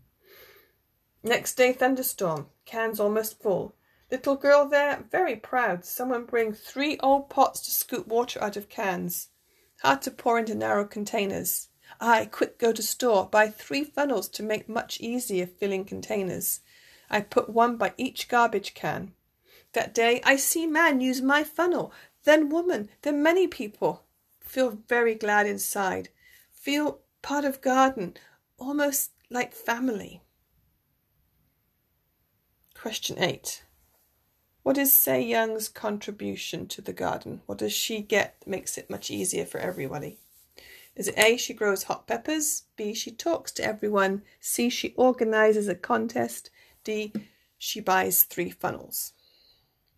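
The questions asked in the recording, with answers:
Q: What is Sae Young's contribution to the garden?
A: D: she buys three funnels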